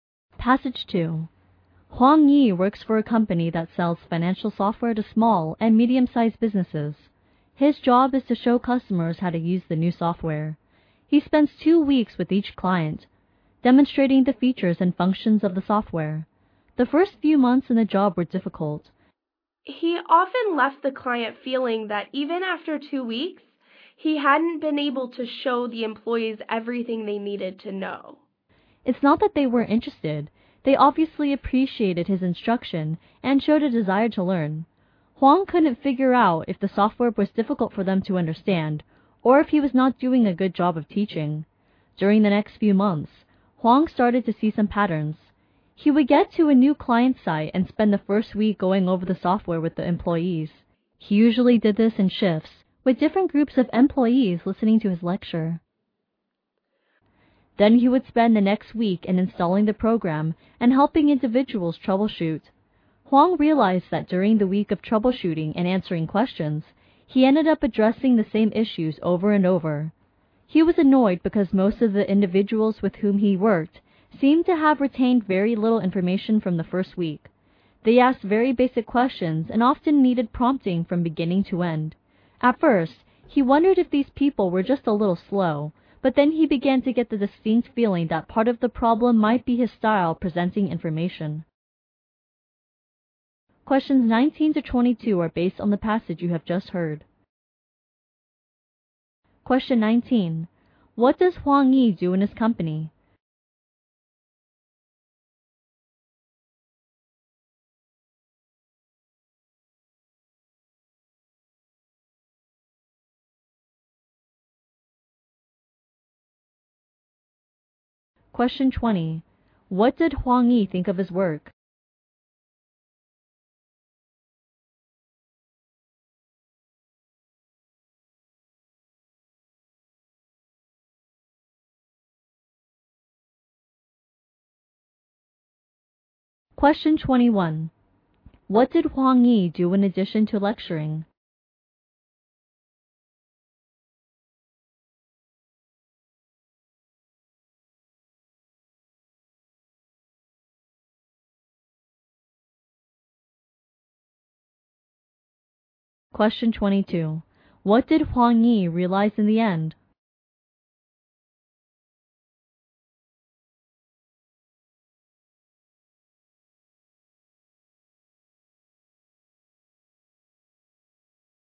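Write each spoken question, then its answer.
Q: What does Huang Yi do in his company?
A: He shows customers how to use the new financial software.

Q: What did Huang Yi do in addition to lecturing?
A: He installed the program and helped individual users troubleshoot.

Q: What did Huang Yi realize in the end?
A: Part of the problem might be his way of presenting information.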